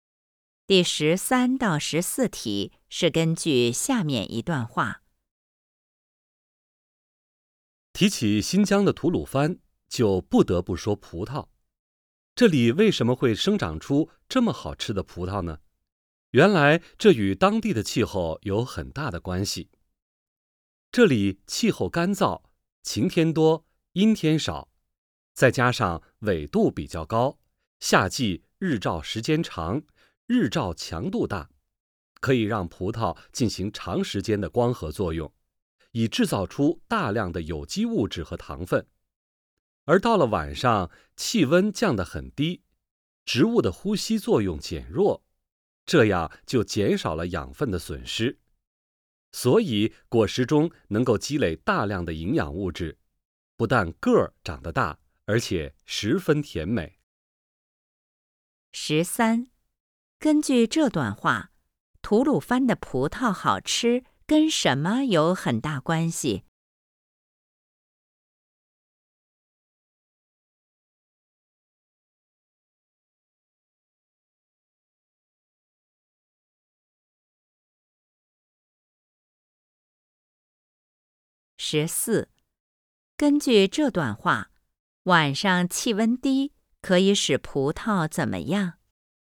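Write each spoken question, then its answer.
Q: 根据这段话,吐鲁番的葡萄好吃跟什么有很大关系?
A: 当地的气候

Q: 根据这段话,晚上气温低,可以使葡萄怎么样?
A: 减少养分的损失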